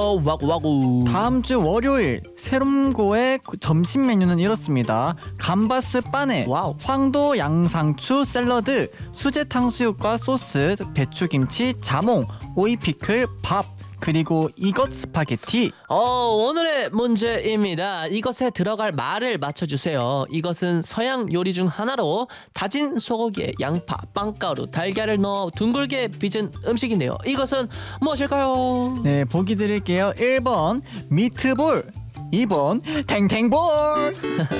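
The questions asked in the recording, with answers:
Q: 이것은 무엇일까요?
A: 1: 미트볼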